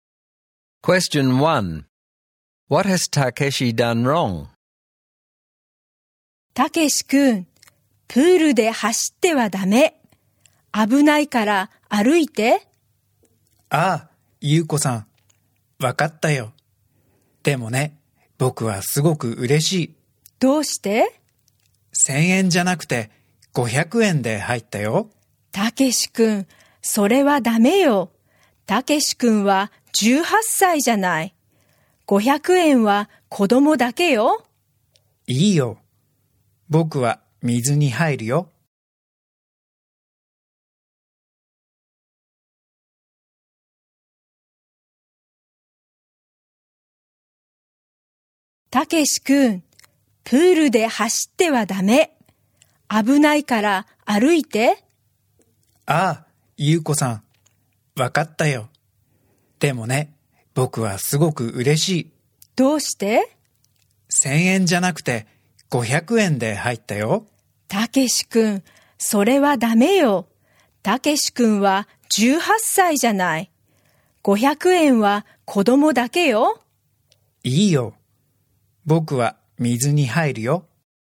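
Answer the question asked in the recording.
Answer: He ran at the pool and paid the 500-yen child entry fee although he is 18, not a child.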